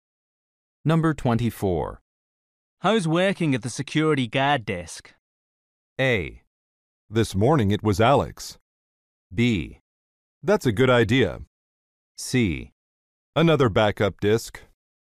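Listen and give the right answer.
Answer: A: This morning it was Alex.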